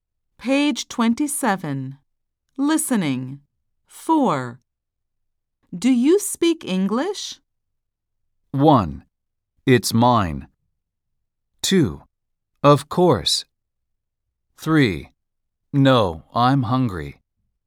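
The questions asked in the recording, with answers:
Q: Do you speak English?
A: 2: Of course.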